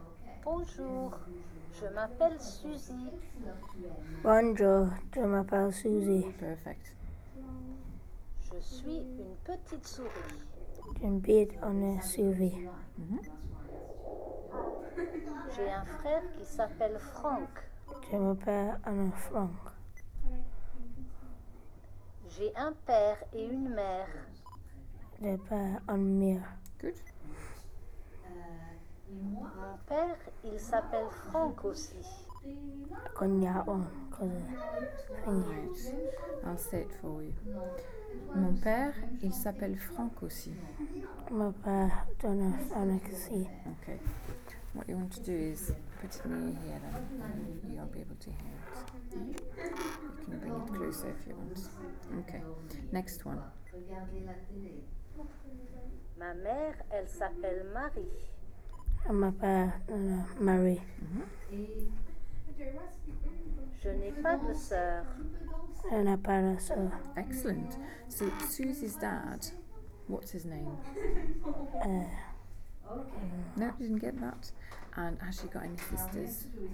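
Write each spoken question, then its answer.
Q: So, Susie's dad, what's his name?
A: Frank

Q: And has she got any sisters?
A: No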